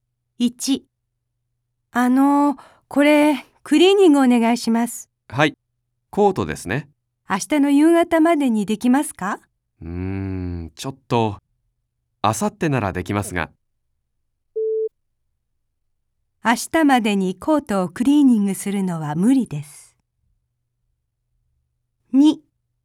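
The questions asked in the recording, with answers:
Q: 明日までにコートをクリーニングするのは無理です。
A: 正しい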